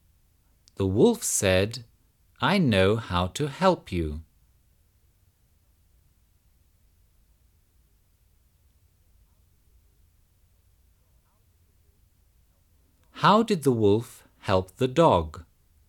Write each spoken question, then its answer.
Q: How did the wolf help the dog?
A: The wolf took the farmer's son and gave him to the dog.